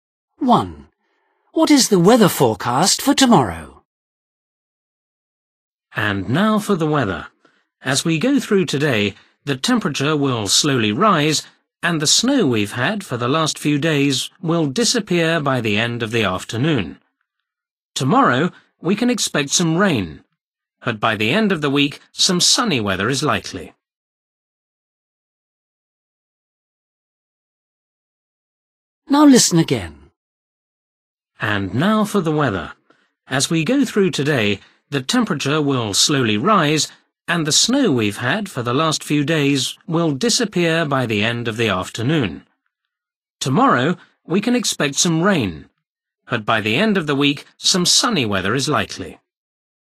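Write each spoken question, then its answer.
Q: What is the weather forecast for tomorrow?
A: rain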